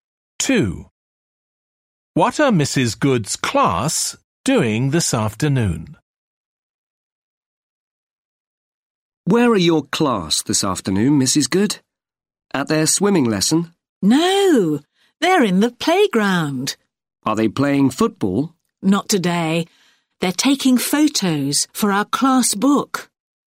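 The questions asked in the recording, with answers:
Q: What are Mrs. Good's class doing this afternoon?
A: Taking photos in the playground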